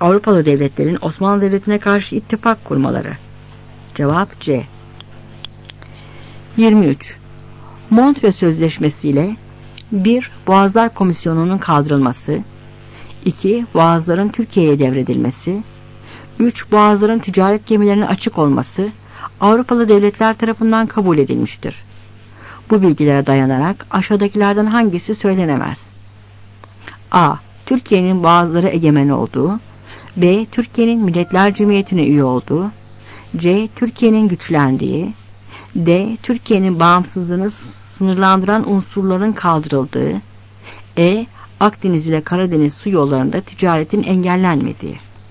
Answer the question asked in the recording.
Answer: Cevap B.